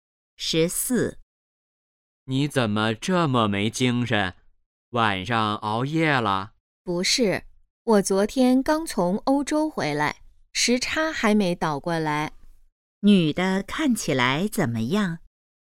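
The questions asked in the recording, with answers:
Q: 女的看起来怎么样?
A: 没精神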